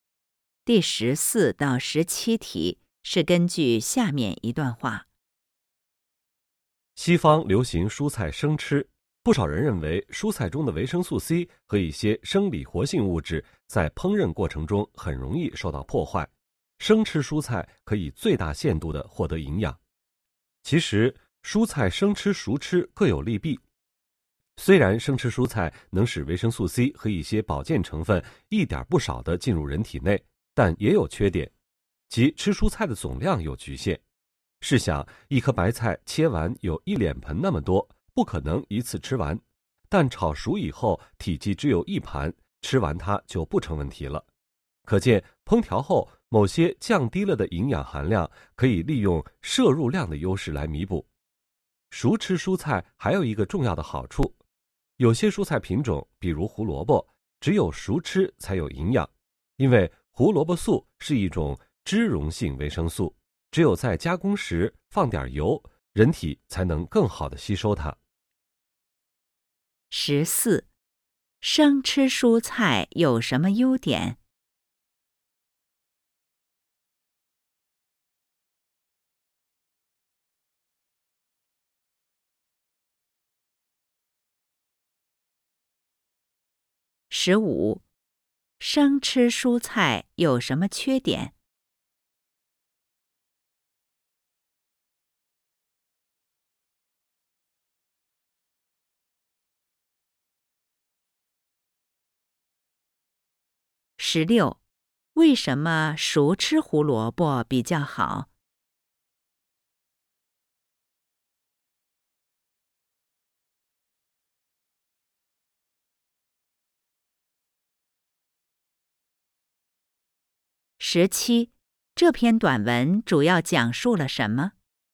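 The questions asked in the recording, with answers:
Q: 生吃蔬菜有什么优点?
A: 维生素C和一些保健成分一点不少地进入人体

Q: 生吃蔬菜有什么缺点?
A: 吃蔬菜的总量有局限

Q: 为什么熟吃胡萝卜比较好?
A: 胡萝卜素是脂溶性维生素,加工时放点油人体才能更好地吸收

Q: 这篇短文主要讲述了什么?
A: 蔬菜生吃和熟吃各有利弊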